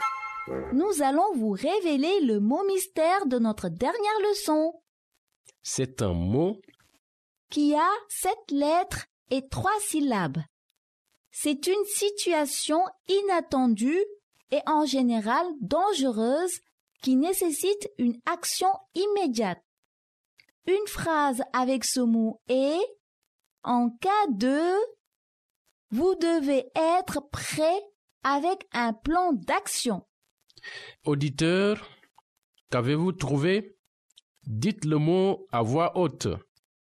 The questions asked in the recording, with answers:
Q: Auditeur, qu'avez-vous trouvé?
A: Le mot mystère d'aujourd'hui est « Urgence ».